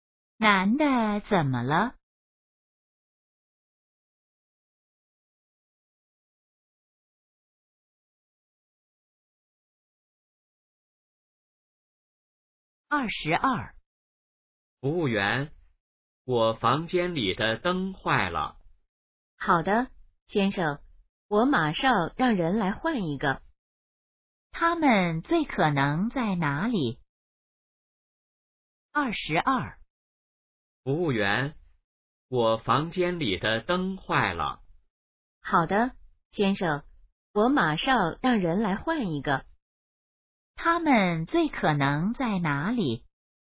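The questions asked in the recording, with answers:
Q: 他们最可能在哪里?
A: 宾馆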